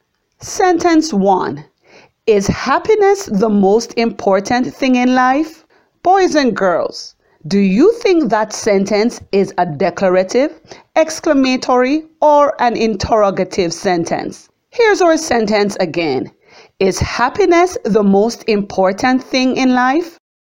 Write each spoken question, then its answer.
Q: Boys and girls, do you think that sentence is a declarative, exclamatory, or an interrogative sentence?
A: Yes, you are correct. This is an interrogative sentence as a question is being asked.